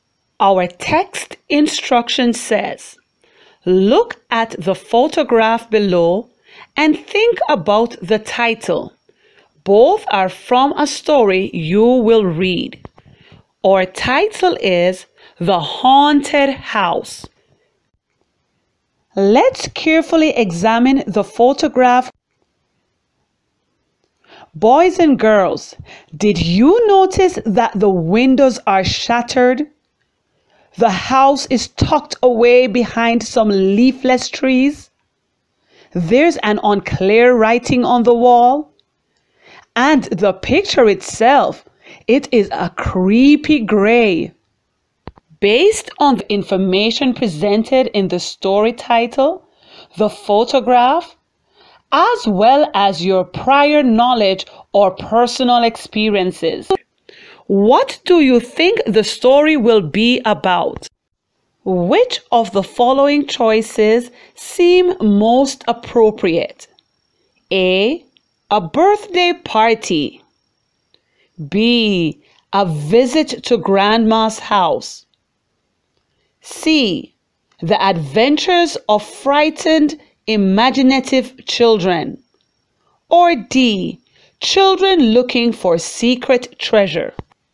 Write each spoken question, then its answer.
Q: Which of the following choices seem most appropriate?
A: But The Adventures of Frightened Imaginative Children stands out as a good prediction.